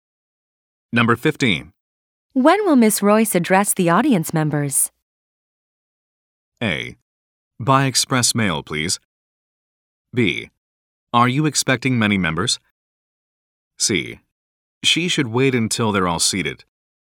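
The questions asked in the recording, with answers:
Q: When will Miss Royce address the audience members?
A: C: She should wait until they're all seated.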